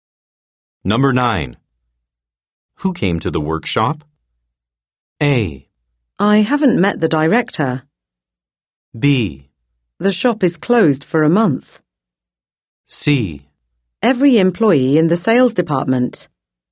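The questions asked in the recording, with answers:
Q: Who came to the workshop?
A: C: Every employee in the sales department.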